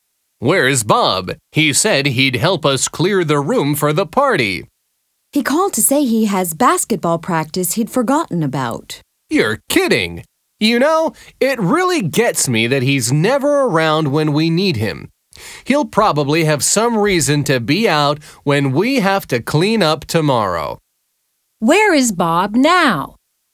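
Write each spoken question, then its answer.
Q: Where is Bob now?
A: At basketball practice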